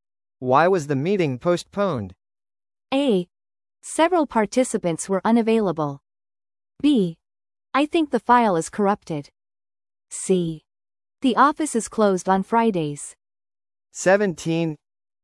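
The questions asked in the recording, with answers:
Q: Why was the meeting postponed?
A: A: Several participants were unavailable.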